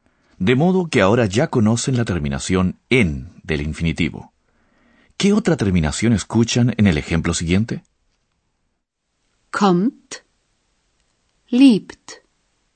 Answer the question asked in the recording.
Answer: Pues acabo de oír una T.